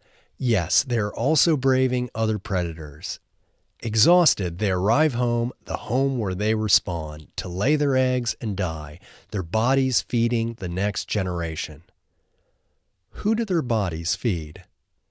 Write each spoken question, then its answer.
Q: Who do their bodies feed?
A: Their bodies feed the next generation.